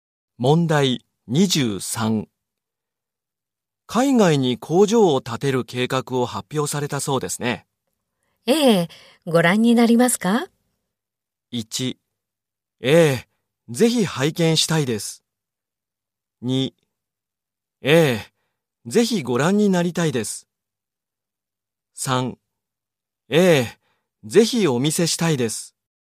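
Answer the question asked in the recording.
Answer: 1: ええ、ぜひ拝見したいです。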